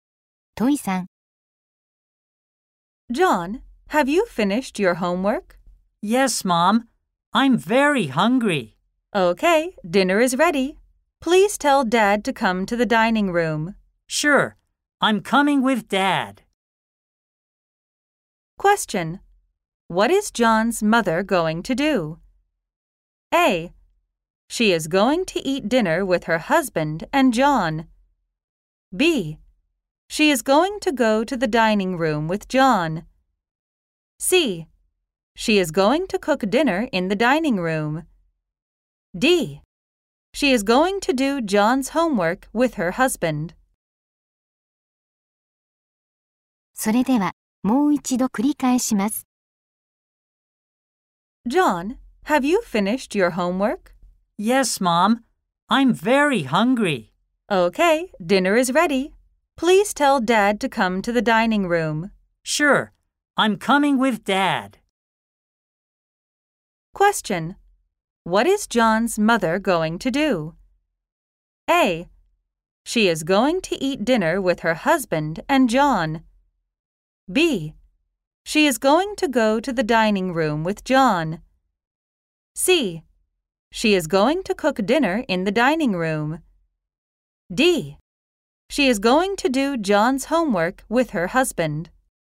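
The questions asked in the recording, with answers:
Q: What is John's mother going to do?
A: A: She is going to eat dinner with her husband and John.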